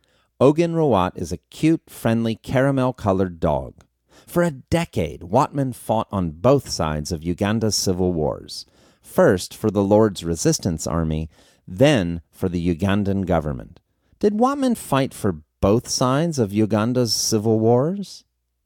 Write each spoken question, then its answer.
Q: Did Wattman fight for both sides of Uganda's civil wars?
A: Yes, Wattman fought for both sides of Uganda's civil wars.